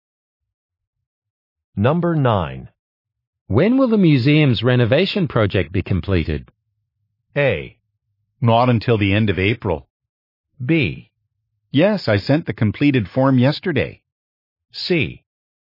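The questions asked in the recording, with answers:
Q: When will the museum's renovation project be completed?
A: A: Not until the end of April.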